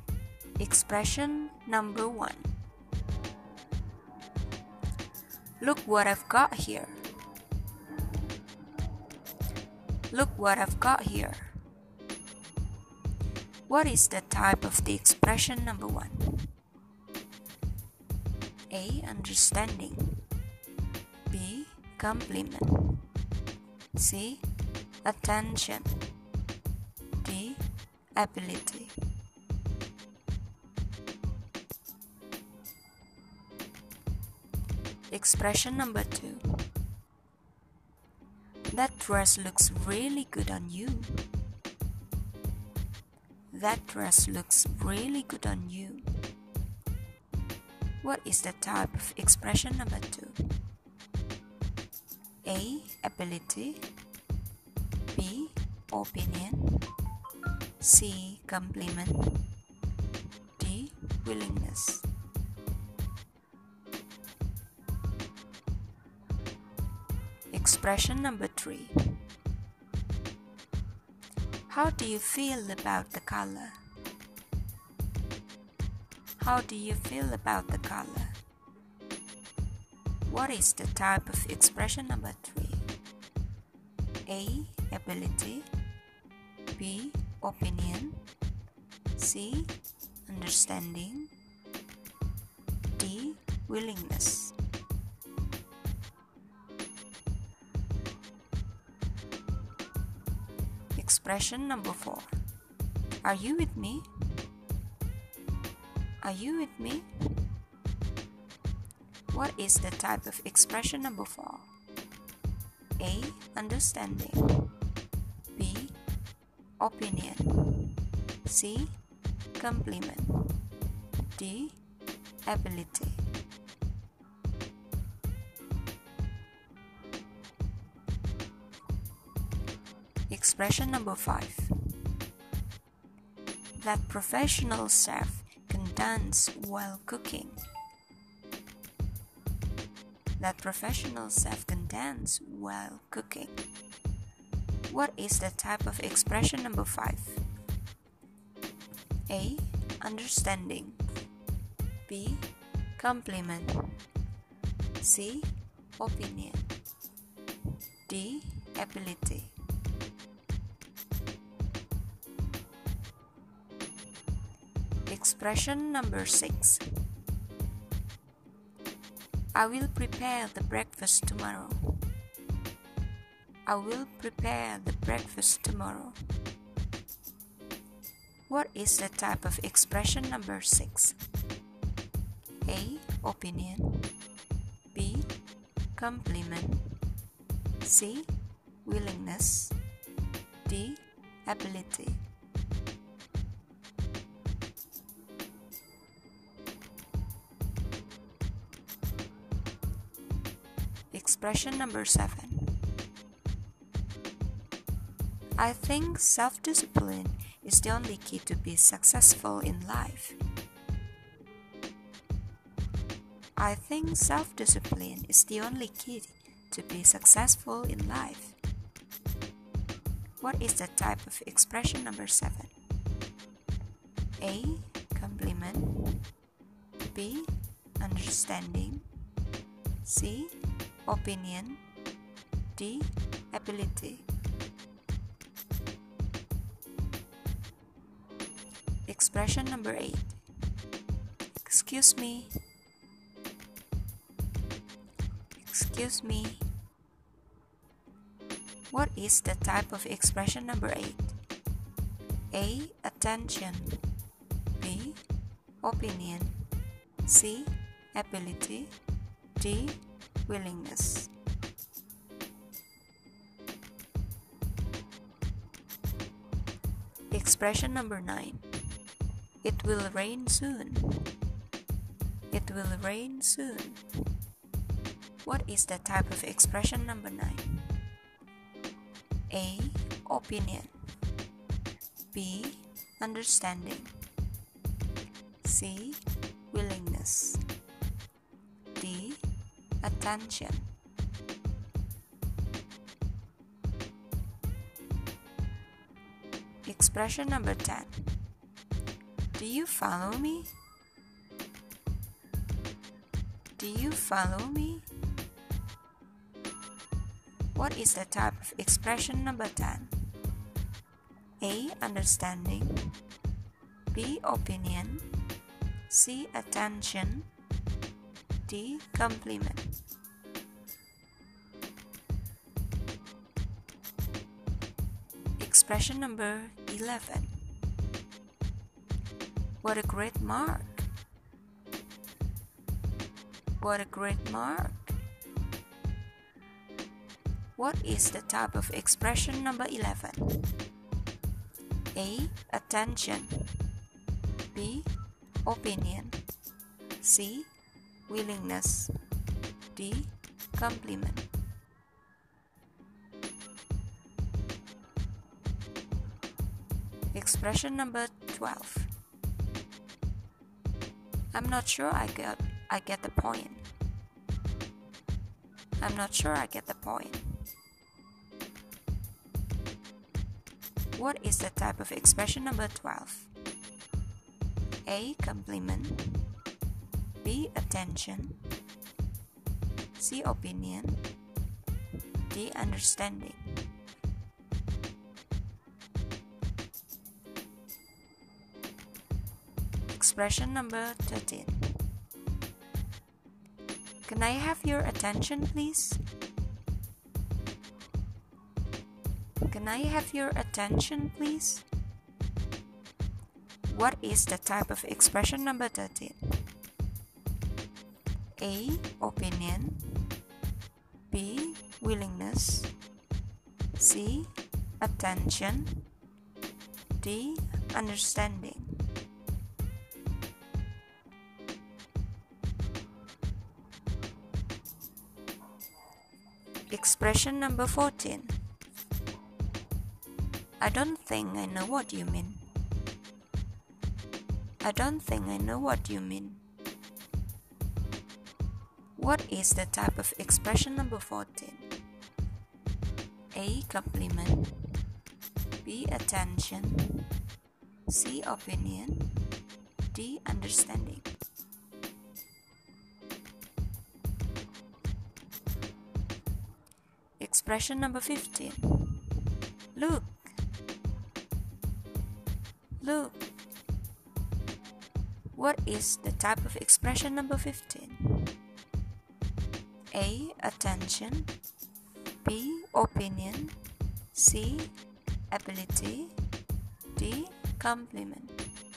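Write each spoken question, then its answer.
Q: What is the type of expression number two?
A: C: Compliment

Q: What is the type of expression number three?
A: B: Opinion

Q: What is the type of expression number four?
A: A: Understanding

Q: What is the type of expression number five?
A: D: Ability

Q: What is the type of expression number six?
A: C: Willingness

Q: What is the type of expression number seven?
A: C: opinion

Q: What is the type of expression number 8?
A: A: Attention

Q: What is the type of expression number 10?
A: A: Understanding

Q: What is the type of expression number 11?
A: D: Compliment

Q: What is the type of expression number 12?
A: D: Understanding

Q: What is the type of expression number 13?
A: C: Attention

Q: What is the type of expression number 14?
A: D: Understanding

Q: What is the type of expression number 15?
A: A: Attention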